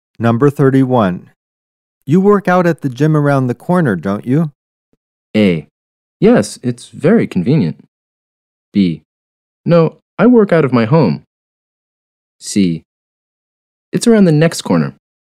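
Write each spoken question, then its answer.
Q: You work out at the gym around the corner, don't you?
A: A: Yes, it's very convenient.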